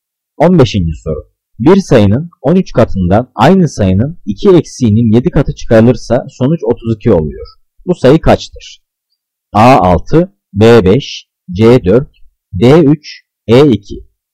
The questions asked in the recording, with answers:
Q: Bu sayı kaçtır?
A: Cevap B3.